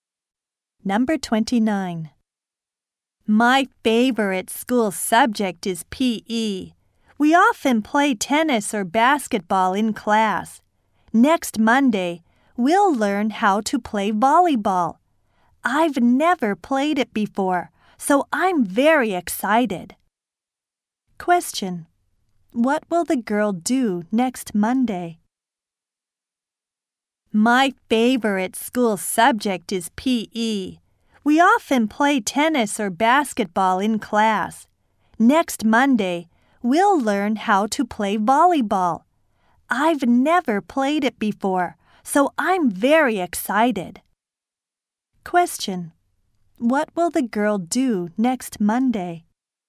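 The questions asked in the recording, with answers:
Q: What will the girl do next Monday?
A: Learn how to play volleyball.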